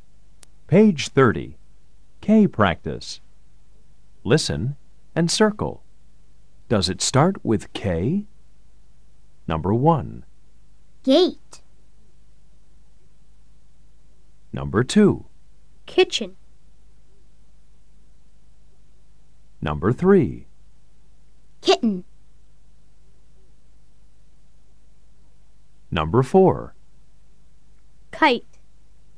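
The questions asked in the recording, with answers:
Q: Kitchen.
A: Yes

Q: Kitten.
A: Yes

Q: Kite.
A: Yes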